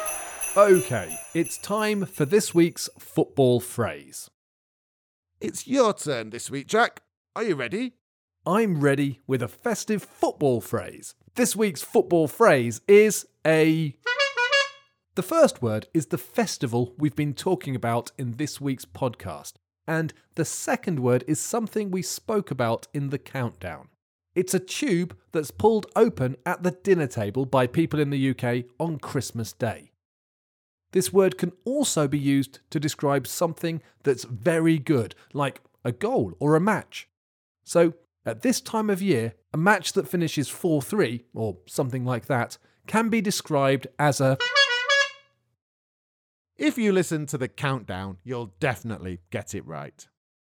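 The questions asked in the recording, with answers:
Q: So, at this time of year, a match that finishes 4-3, or something like that, can be described as a...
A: a Christmas cracker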